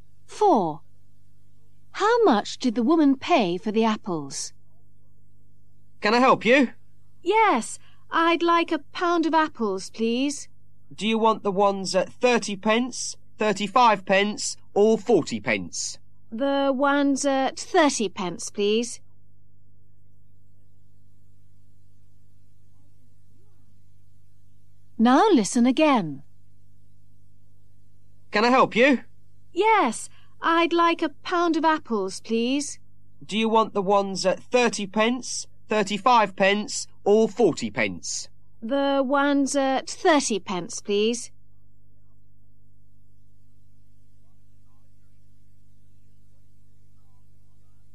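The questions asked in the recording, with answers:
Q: How much did the woman pay for the apples?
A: 30 pence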